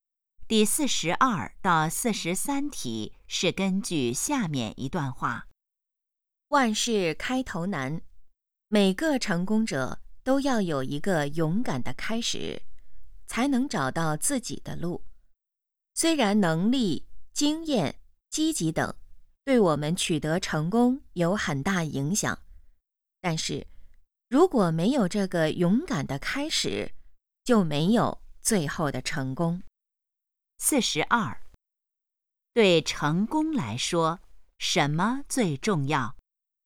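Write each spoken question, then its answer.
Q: 对成功来说,什么最重要?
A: 勇敢的开始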